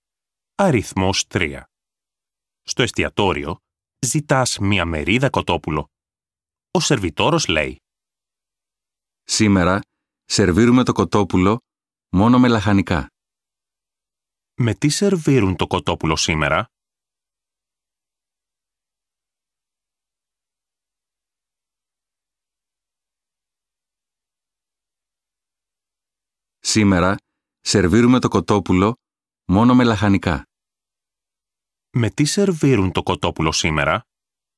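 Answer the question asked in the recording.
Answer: μόνο με λαχανικά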